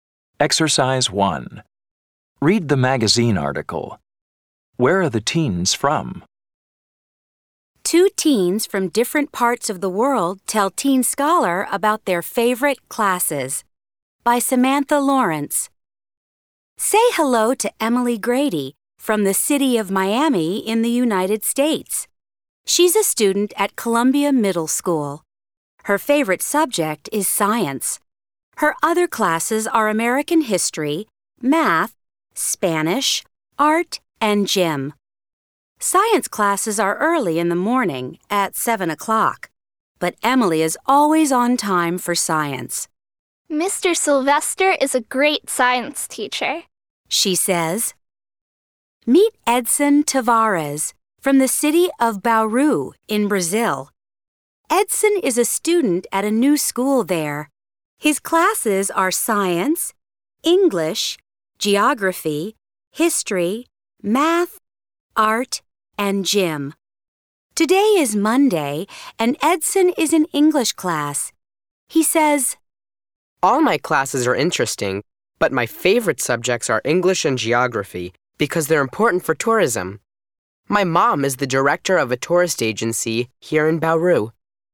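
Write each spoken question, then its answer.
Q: Where are the teens from?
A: Emily is from Miami in the United States and Edson is from Bauru in Brazil.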